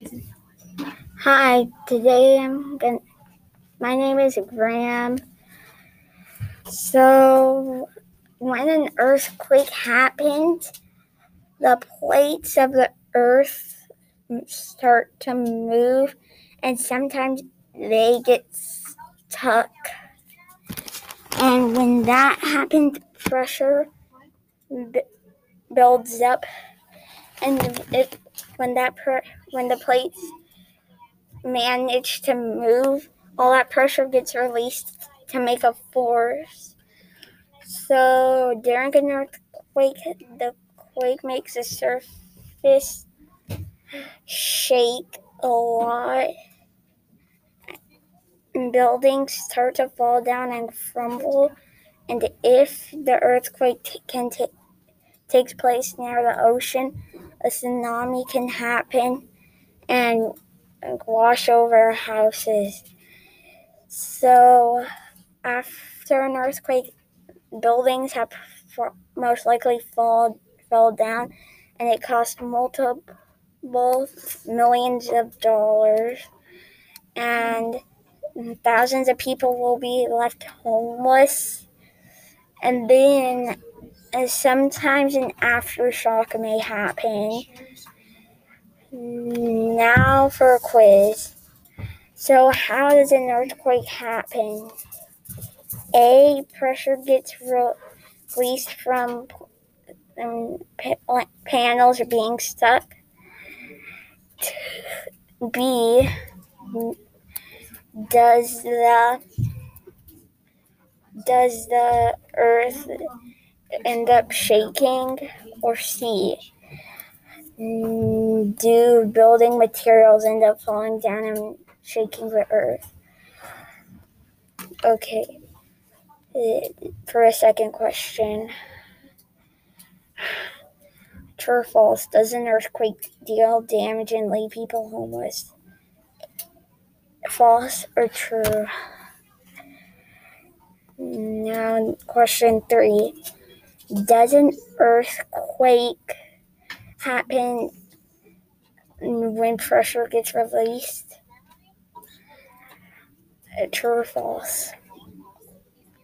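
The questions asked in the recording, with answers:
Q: So how does an earthquake happen?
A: A: pressure gets released from panels are being stuck.

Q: True or false, does an earthquake deal damage and leave people homeless?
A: True

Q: Does an earthquake happen when pressure gets released?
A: True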